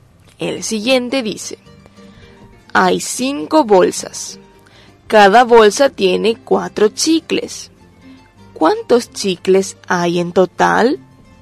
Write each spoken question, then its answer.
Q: ¿cuántos chicles hay en total?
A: Hay en total 20 chicles.